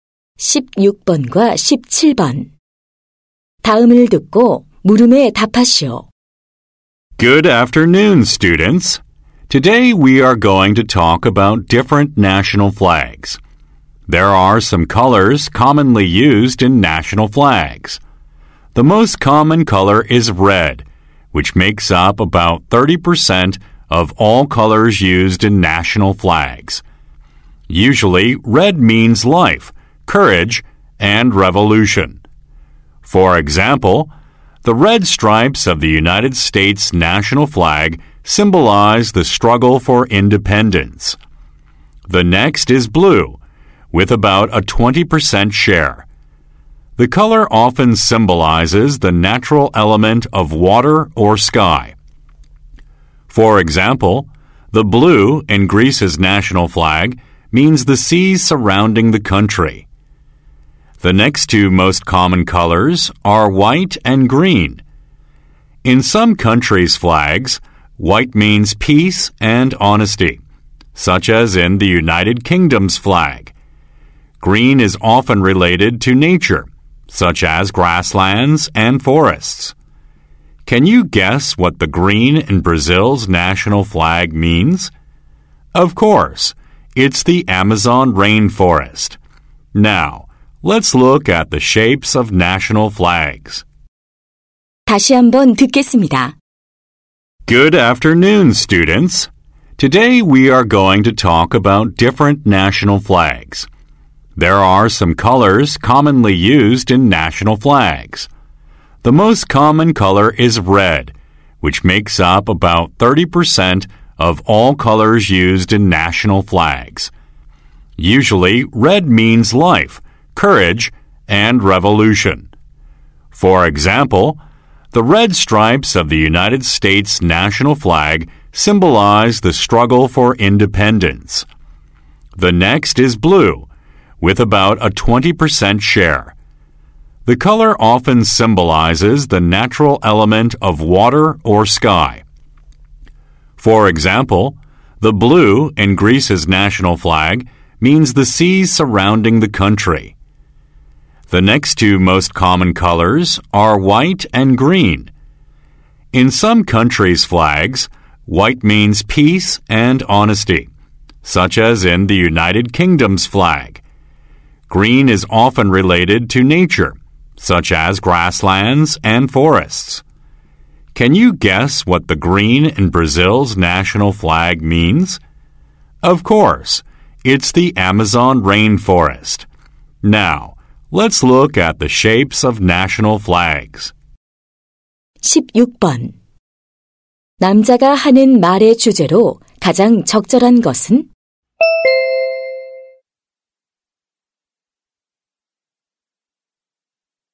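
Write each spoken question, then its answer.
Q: 남자가 하는 말의 주제로 가장 적절한 것은?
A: 국기에 흔히 쓰이는 색과 그 의미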